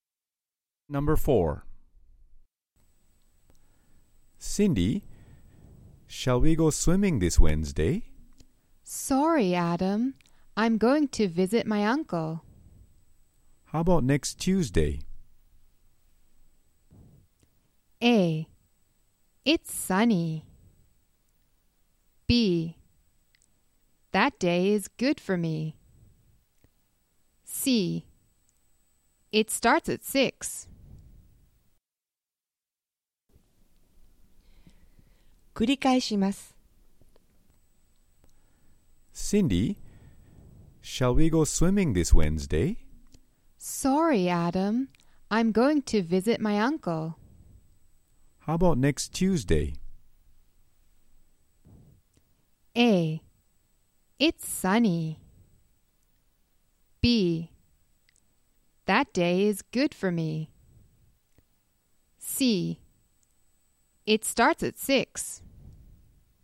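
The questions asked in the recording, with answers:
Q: How about next Tuesday?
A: B: That day is good for me.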